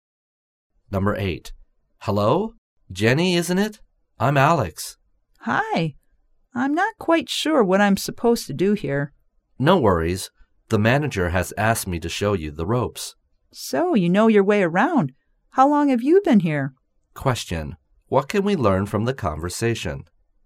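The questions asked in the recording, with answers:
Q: What can we learn from the conversation?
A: Jenny is new there, and Alex is going to show her how things work.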